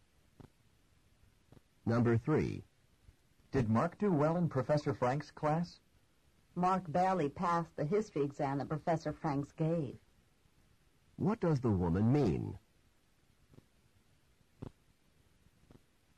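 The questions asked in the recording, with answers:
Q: What does the woman mean?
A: Mark only just passed the exam.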